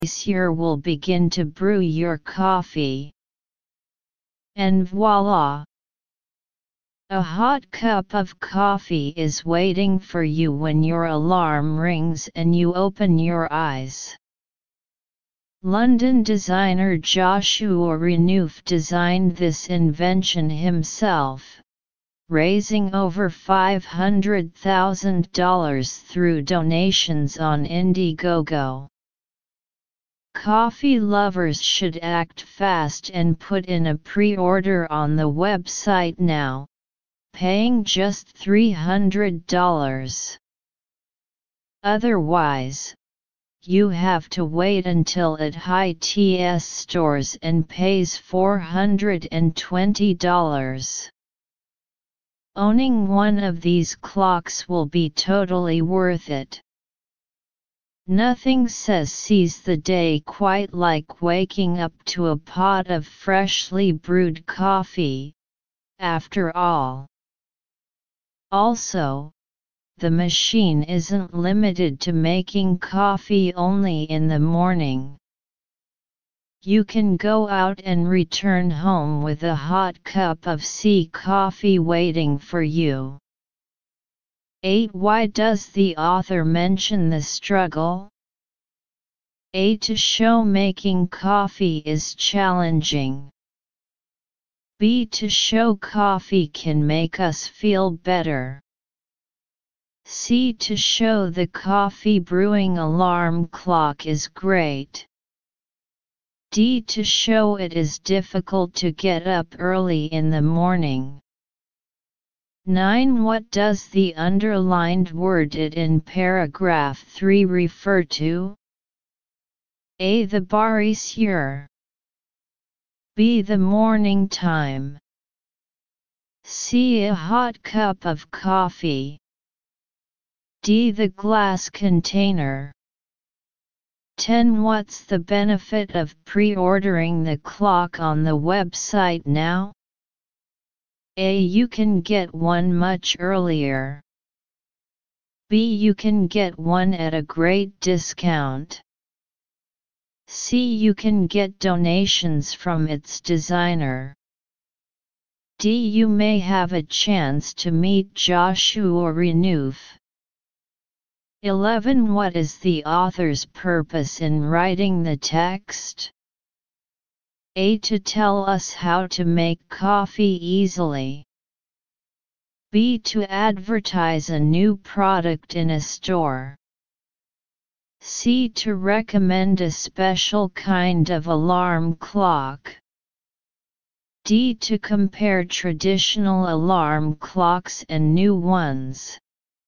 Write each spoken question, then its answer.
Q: What's the benefit of pre-ordering the clock on the website now?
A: 10. B.

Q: What is the author's purpose in writing the text?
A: 11. C.